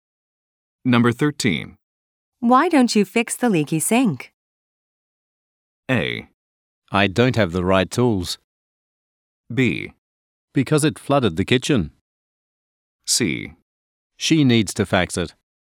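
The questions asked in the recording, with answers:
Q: Why don't you fix the leaky sink?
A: A: I don't have the right tools.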